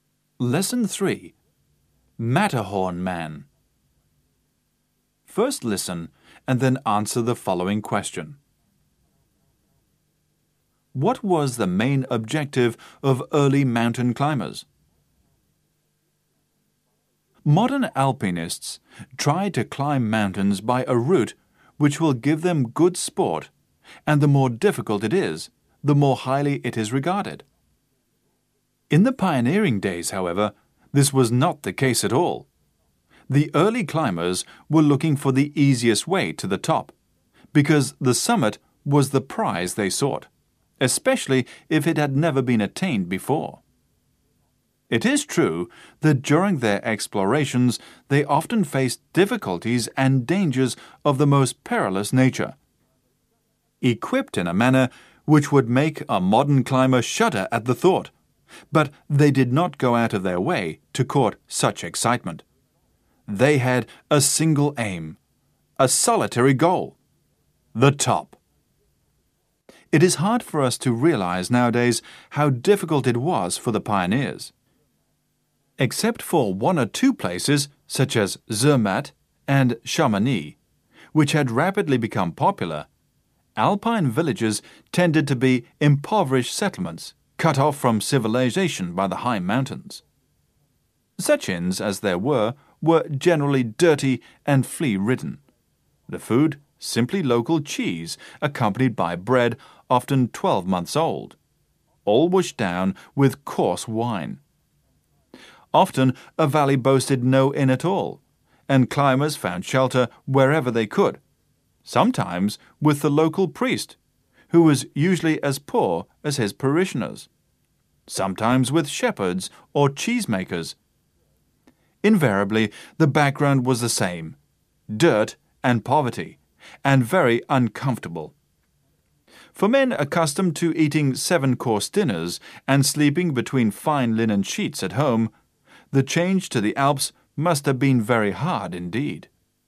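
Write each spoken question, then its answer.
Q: What was the main objective of early mountain climbers?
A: To reach the summit (the top) by the easiest way, especially if it had never been reached before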